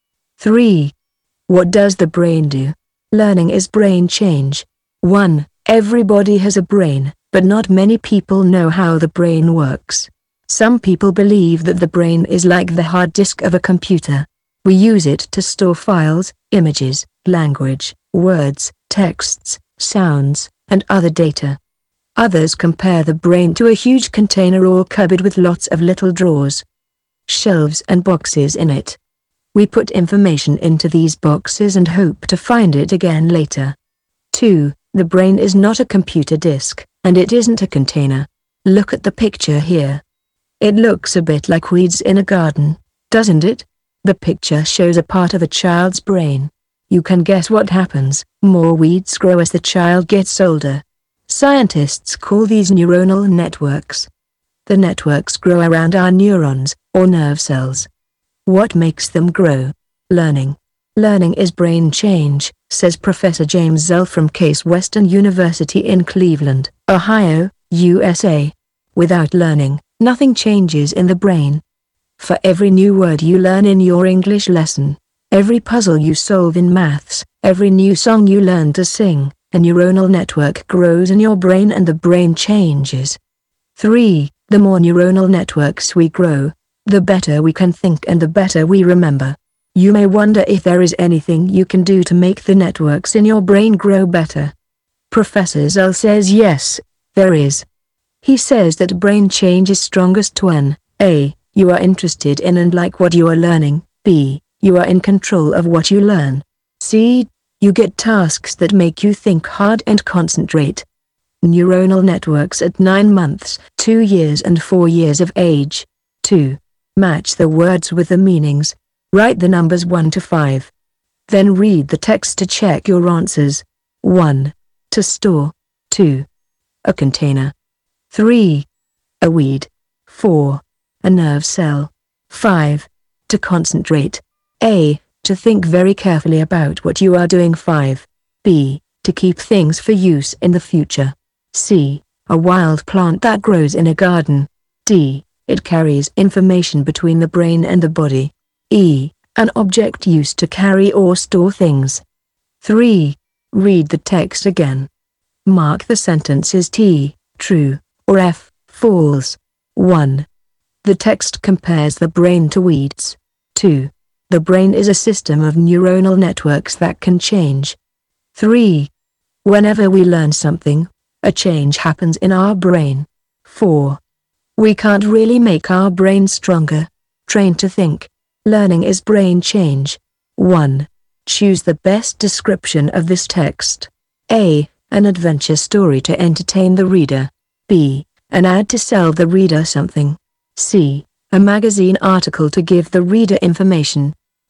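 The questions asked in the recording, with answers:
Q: Choose the best description of this text.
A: C: A magazine article to give the reader information.

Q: The brain is a system of neuronal networks that can change.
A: True

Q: Whenever we learn something, a change happens in our brain.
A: True

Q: We can't really make our brain stronger.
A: False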